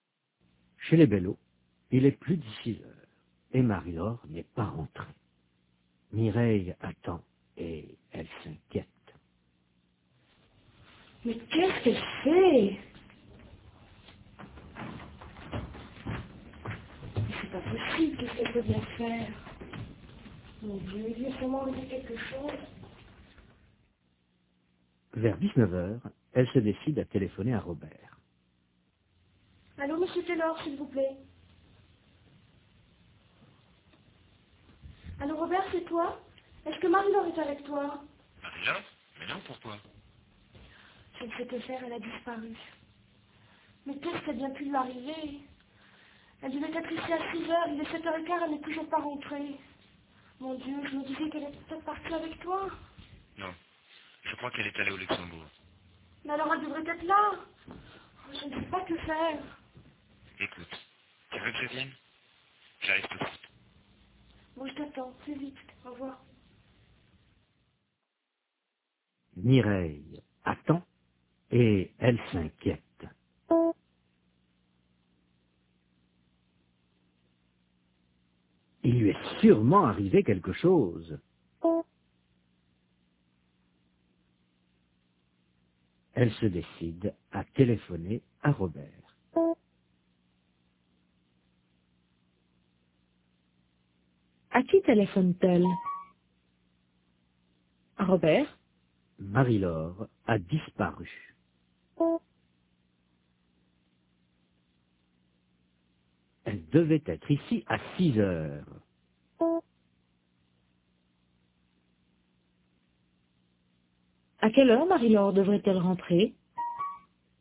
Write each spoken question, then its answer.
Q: À quelle heure Marie-Laure devrait-elle rentrer?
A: À 6h.